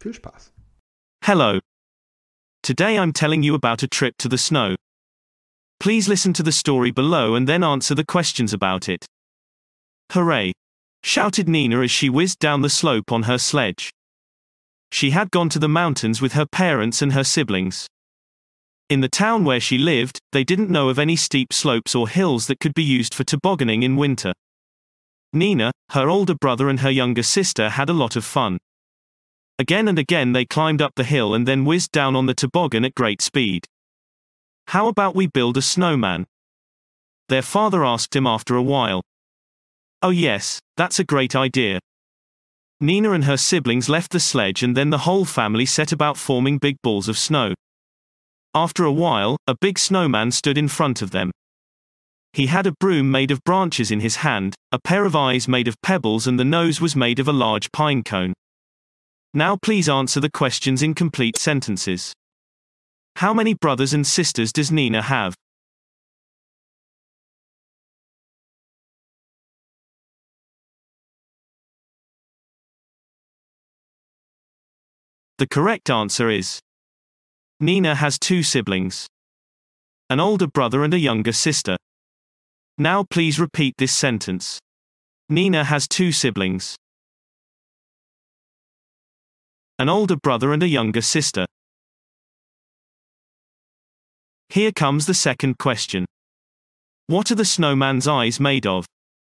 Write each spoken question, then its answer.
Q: How many brothers and sisters does Nina have?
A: The correct answer is Nina has two siblings, an older brother and a younger sister.

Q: What are the snowman's eyes made of?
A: The correct answer is the snowman's eyes are made of pebbles.